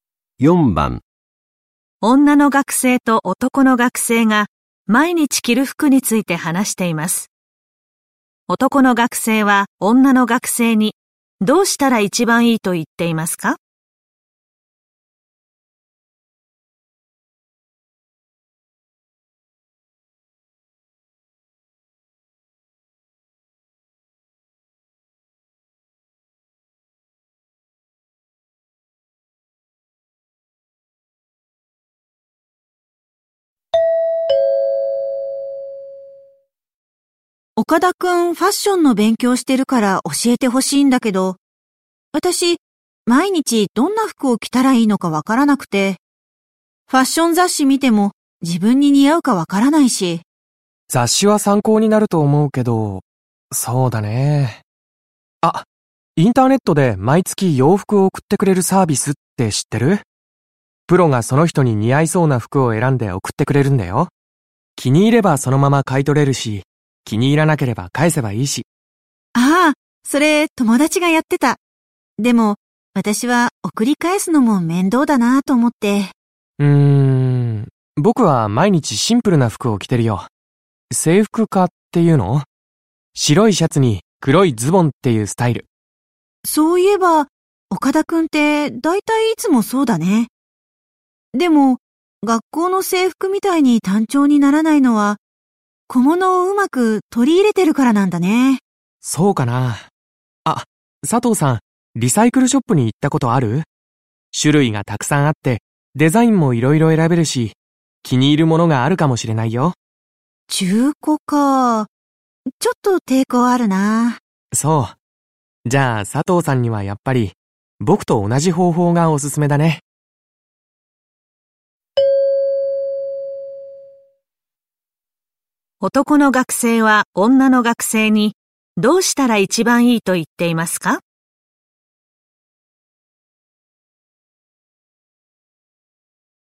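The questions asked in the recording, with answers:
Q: 男の学生は女の学生にどうしたら一番いいと言っていますか?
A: 男の学生と同じように、毎日制服のようなシンプルな服(白いシャツに黒いズボンなど)を着る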